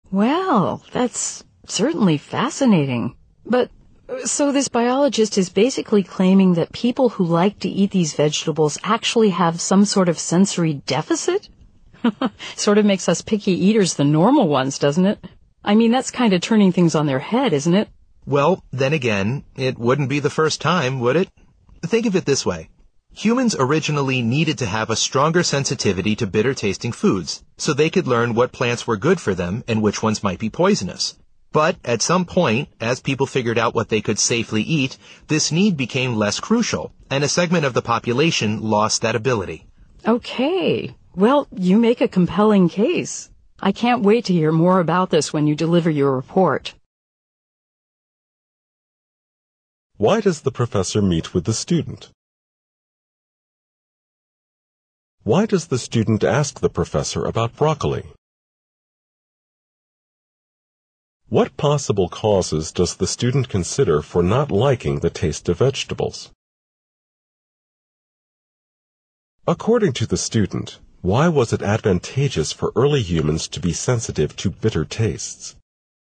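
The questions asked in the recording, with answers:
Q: According to the student, why was it advantageous for early humans to be sensitive to bitter tastes?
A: It helped them learn which plants were good for them and which might be poisonous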